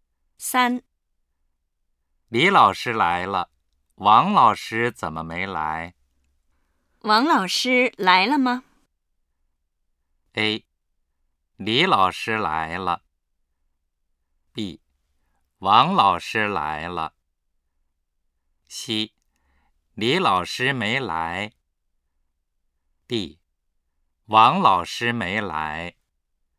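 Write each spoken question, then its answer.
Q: 王老师来了吗?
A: D: 王老师没来。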